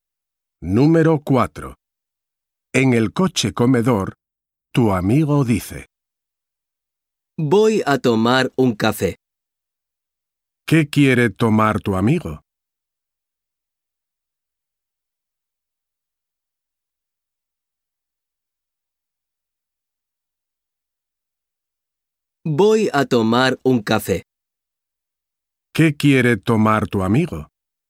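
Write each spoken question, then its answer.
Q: ¿Qué quiere tomar tu amigo?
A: Un café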